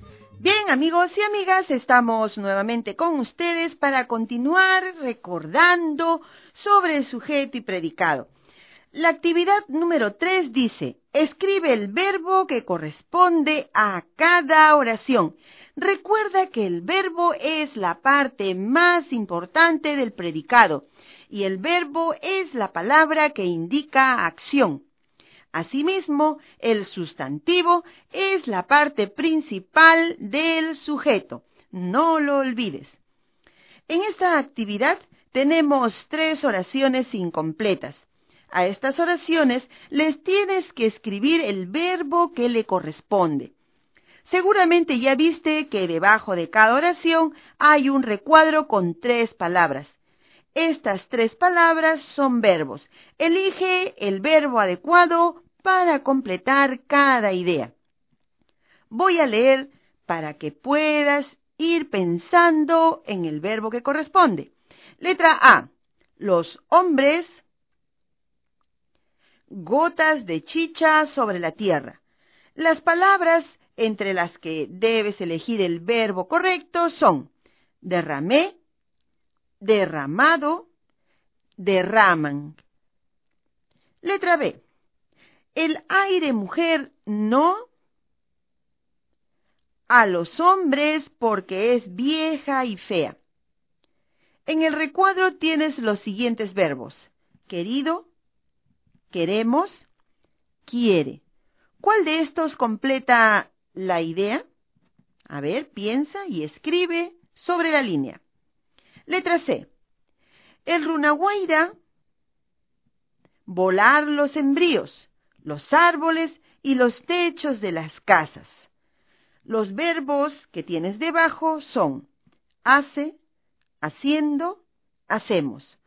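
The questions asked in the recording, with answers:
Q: Letra A: los hombres, gotas de chicha sobre la tierra. Las palabras entre las que debes elegir el verbo correcto son: derramé, derramado, derraman.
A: derraman

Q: ¿Cuál de estos completa la idea?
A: quiere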